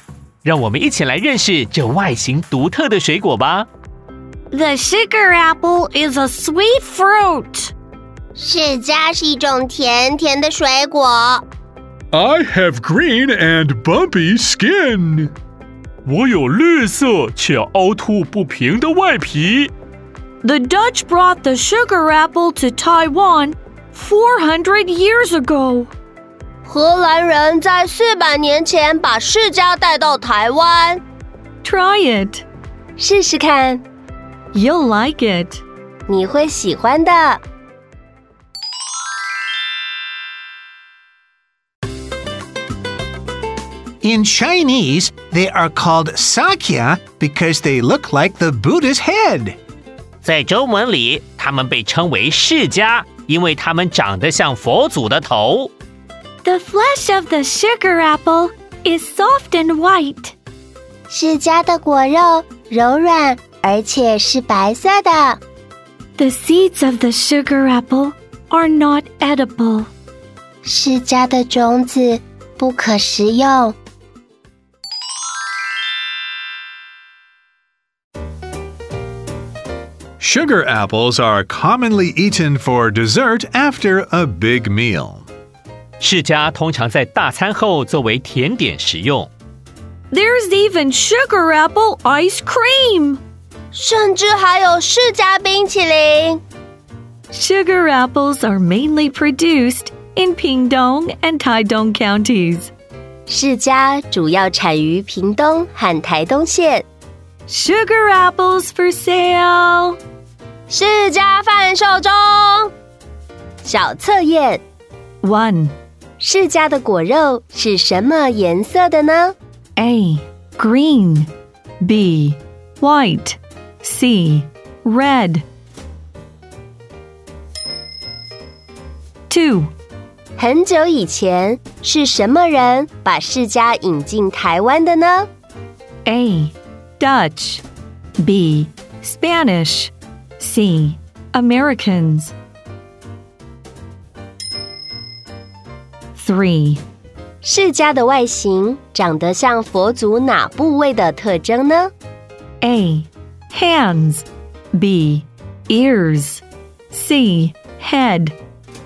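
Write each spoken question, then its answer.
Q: 释迦的果肉是什么颜色的呢?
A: B: White

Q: 很久以前,是什么人把释迦引进台湾的呢?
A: A: Dutch

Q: 释迦的外形长得像佛祖哪部位的特征呢?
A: C: head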